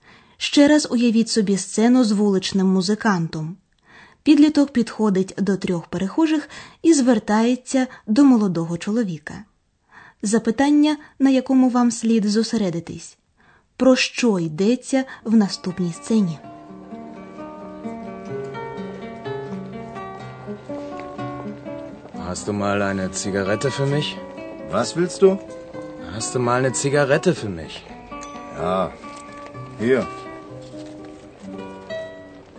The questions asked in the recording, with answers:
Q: Запитання, на якому вам слід зосередитись, про що йдеться в наступній сцені.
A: Отже, у сцені йдеться про те, що підліток хоче попросити сигарету.